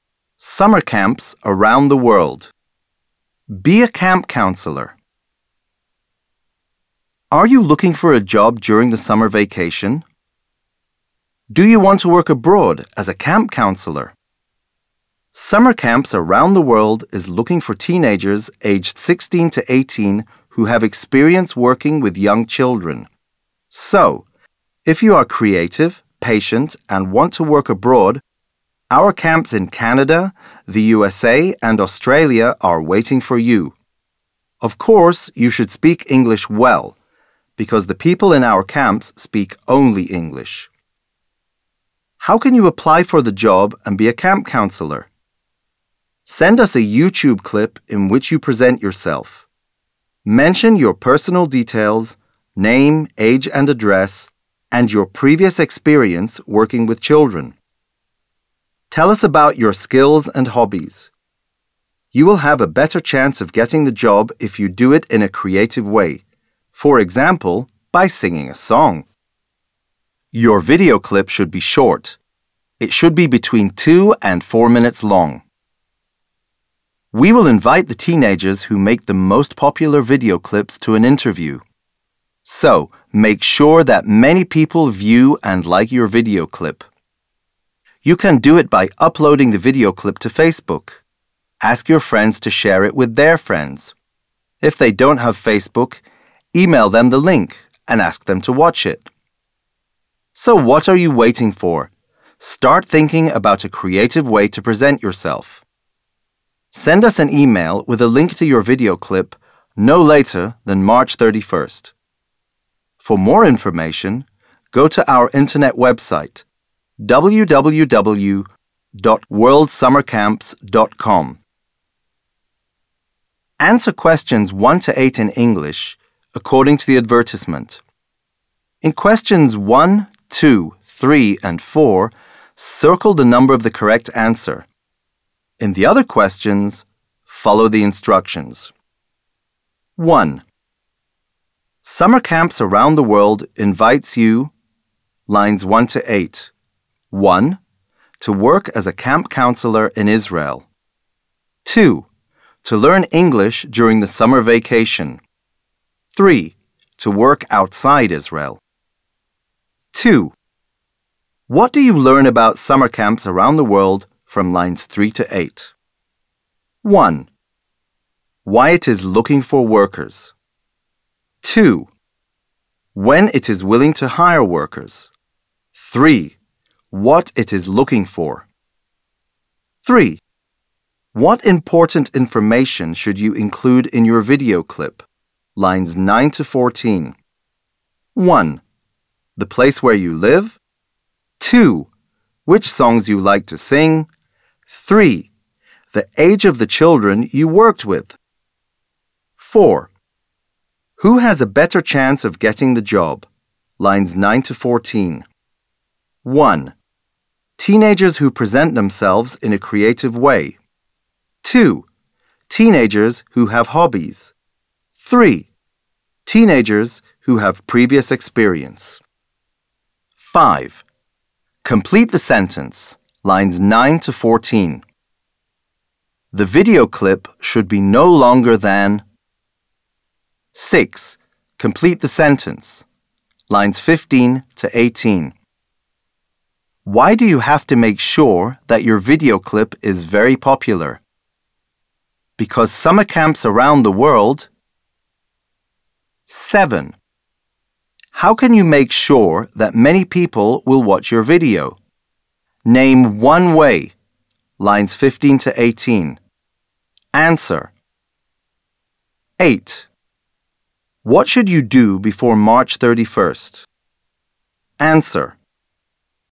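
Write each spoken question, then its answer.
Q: Summer Camps Around the World invites you, lines 1 to 8.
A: 3: To work outside Israel.

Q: What do you learn about summer camps around the world from lines 3 to 8?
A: 3: What it is looking for.

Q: What important information should you include in your video clip?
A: 1: The place where you live.

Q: Who has a better chance of getting the job?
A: 1: Teenagers who present themselves in a creative way.

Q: The video clip should be no longer than.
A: 4 minutes

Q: Why do you have to make sure that your video clip is very popular?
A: Because it will invite the teenagers with the most popular clips to an interview

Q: How can you make sure that many people will watch your video?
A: Upload it to Facebook and ask friends to share it

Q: What should you do before March 31st?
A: Send an email with a link to your video clip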